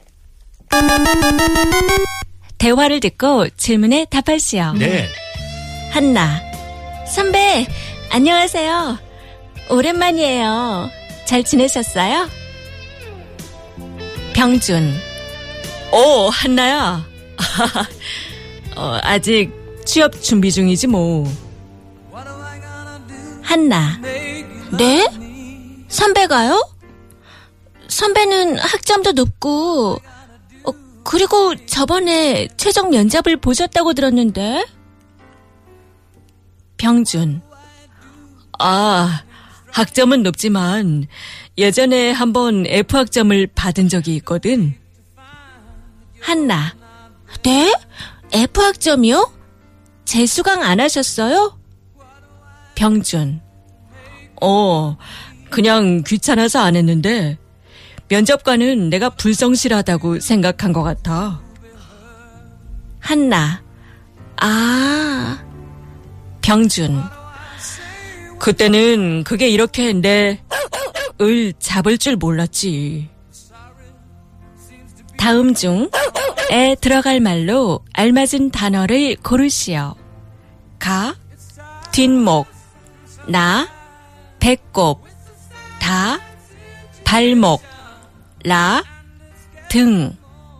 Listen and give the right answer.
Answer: Da. Balmok. Ankle.